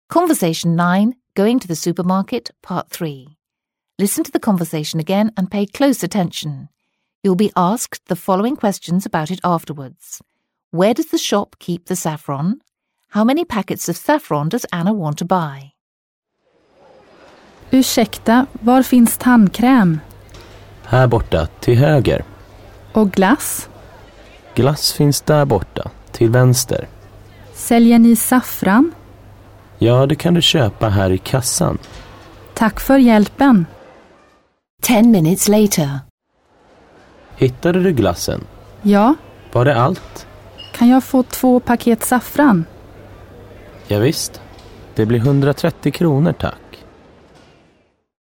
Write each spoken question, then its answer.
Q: Where does the shop keep the saffron?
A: at the cash register